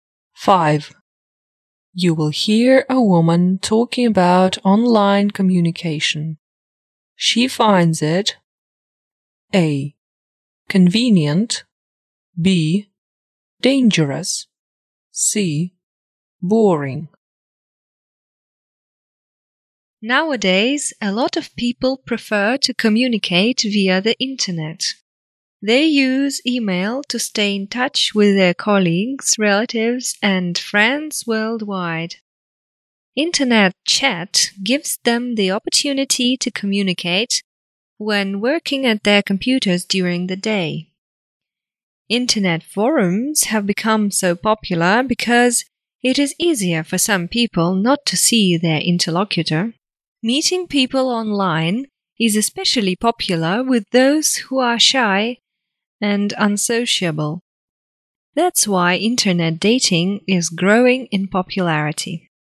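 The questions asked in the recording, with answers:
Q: She finds it A. Convenient.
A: A: Convenient.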